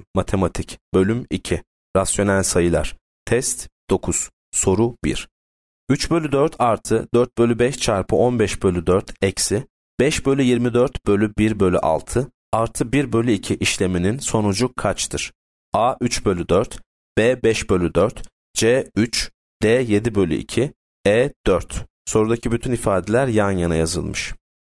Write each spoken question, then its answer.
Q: 3 bölü 4 artı 4 bölü 5 çarpı 15 bölü 4 eksi 5 bölü 24 bölü 1 bölü 6 artı 1 bölü 2 işleminin sonucu kaçtır?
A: Yanıt C. 3.